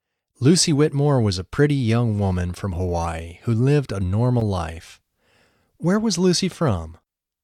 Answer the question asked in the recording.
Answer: Lucy was from Hawaii.